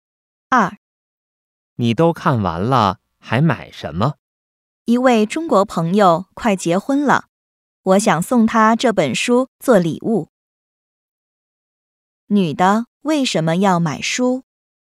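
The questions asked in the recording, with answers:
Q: 女的为什么要买书?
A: 想送给快结婚的中国朋友做礼物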